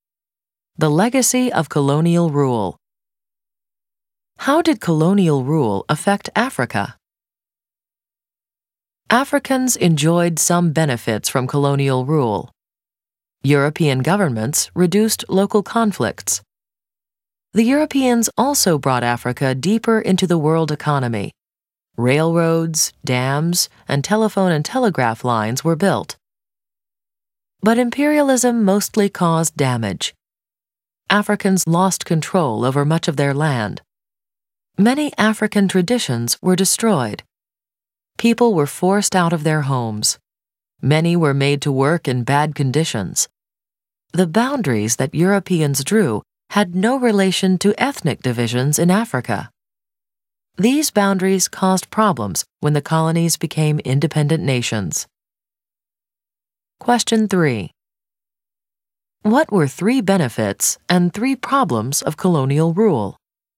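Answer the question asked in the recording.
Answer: Benefits: fewer local conflicts, closer ties to the world economy, railroads/dams/telephone and telegraph lines; problems: loss of land, destroyed traditions, people forced from homes and into bad work, boundaries that ignored ethnic divisions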